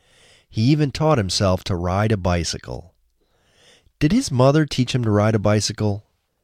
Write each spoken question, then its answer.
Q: Did his mother teach him to ride a bicycle?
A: No, his mother didn't teach him to ride a bicycle.